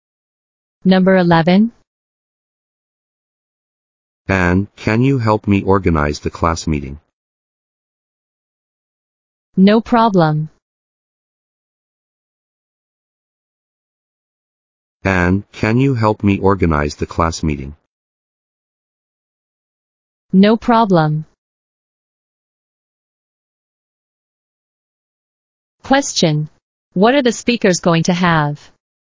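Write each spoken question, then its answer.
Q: What are the speakers going to have?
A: A class meeting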